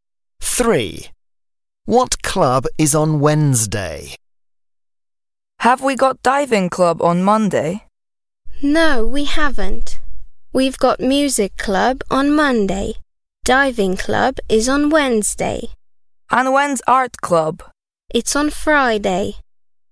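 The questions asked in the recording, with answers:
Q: What club is on Wednesday?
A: Diving club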